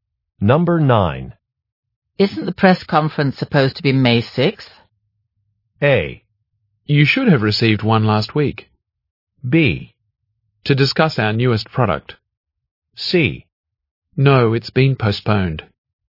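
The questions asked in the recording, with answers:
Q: Isn't the press conference supposed to be May 6th?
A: C: No, it's been postponed.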